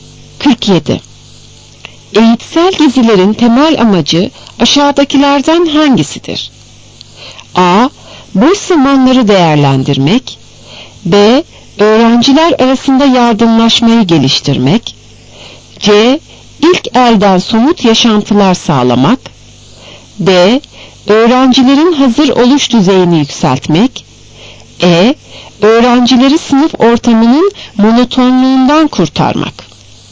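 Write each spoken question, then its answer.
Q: Eğitsel gezilerin temel amacı aşağıdakilerden hangisidir?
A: C: İlk elden somut yaşantılar sağlamak.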